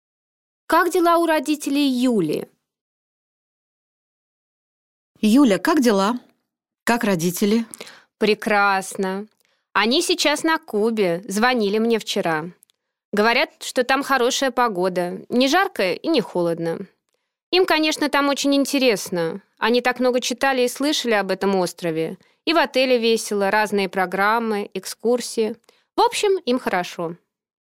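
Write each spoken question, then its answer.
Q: Как дела у родителей Юли?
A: Прекрасно: они на Кубе, им интересно и хорошо.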